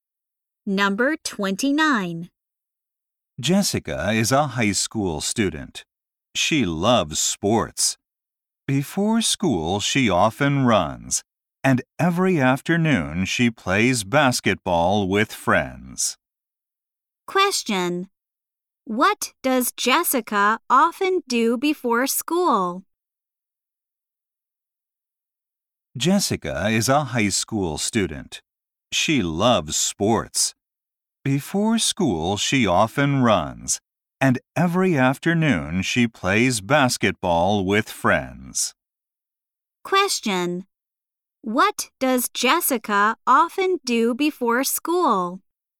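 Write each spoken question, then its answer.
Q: What does Jessica often do before school?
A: She runs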